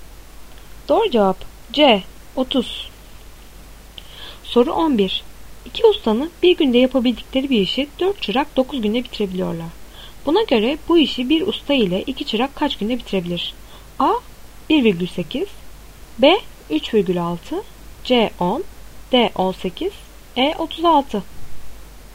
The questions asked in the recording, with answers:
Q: Buna göre bu işi bir usta ile 2 çırak kaç günde bitirebilir?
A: Doğru cevap A 1,8.